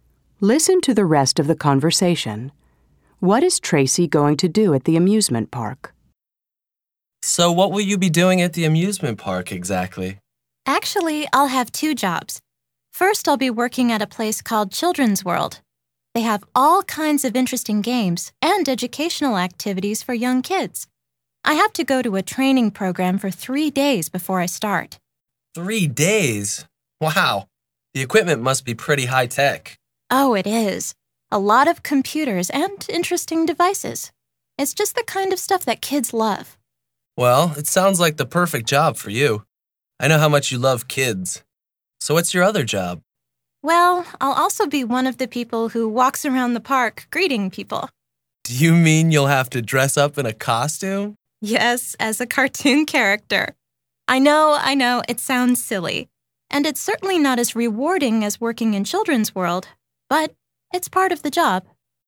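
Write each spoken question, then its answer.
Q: What is Tracy going to do at the amusement park?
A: Work at Children's World with kids' games and educational activities, and walk around the park greeting people dressed as a cartoon character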